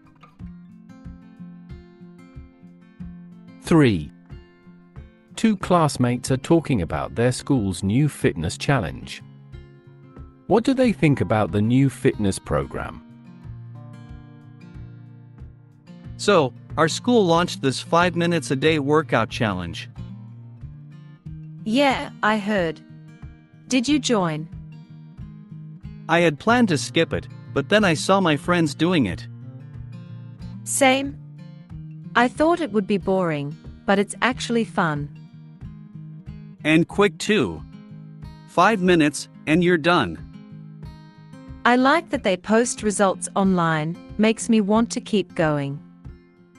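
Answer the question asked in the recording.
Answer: It's fun, quick and motivating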